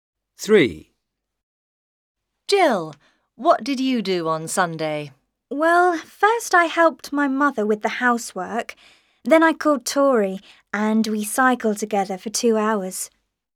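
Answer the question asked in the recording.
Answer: She helped her mother with the housework, then cycled with Tori for 2 hours.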